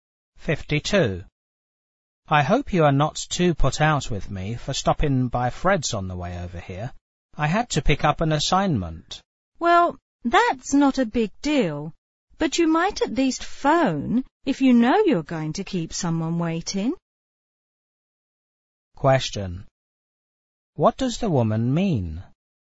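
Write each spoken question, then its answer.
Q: What does the woman mean?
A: The man should have phoned to say he would be late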